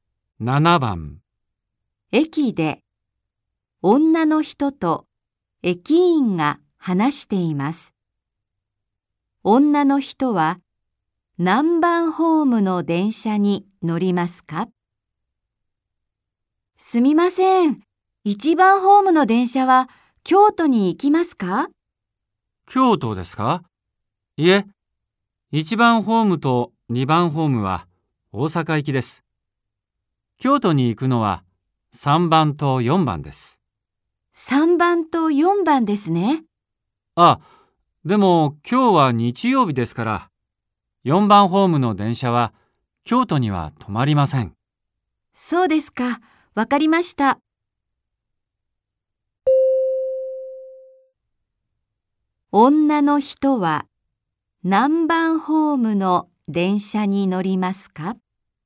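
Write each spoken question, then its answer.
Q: 女の人は何番ホームの電車に乗りますか?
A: 3番ホーム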